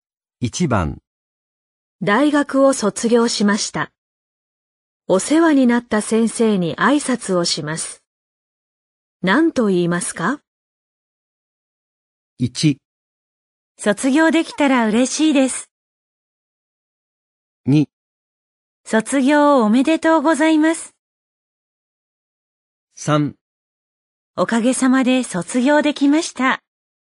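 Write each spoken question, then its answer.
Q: 何と言いますか?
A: 3: おかげさまで卒業できました。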